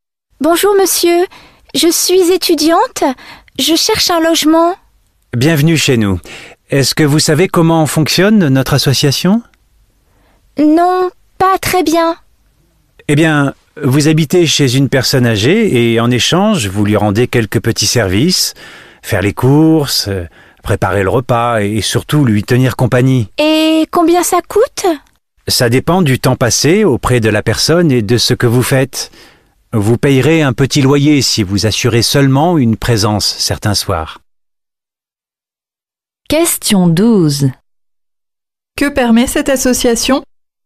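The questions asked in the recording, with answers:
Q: Que permet cette association?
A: De loger un étudiant chez une personne âgée en échange de petits services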